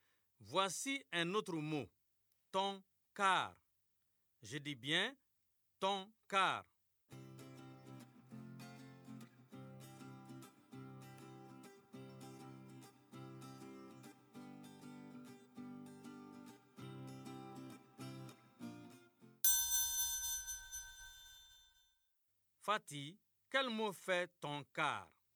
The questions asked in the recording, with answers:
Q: Fatih, quel mot fait ton car?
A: Ton car. C'est carton, monsieur.